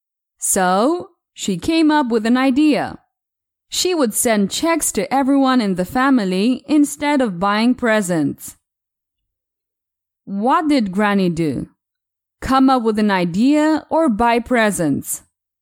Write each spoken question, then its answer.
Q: What did Granny do? Come up with an idea or buy presents?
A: She came up with an idea.